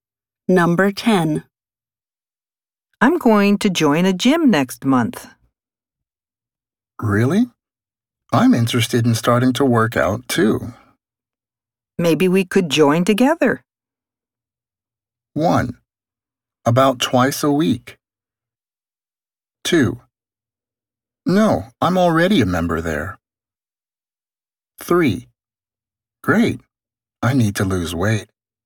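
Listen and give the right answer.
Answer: 3: Great. I need to lose weight.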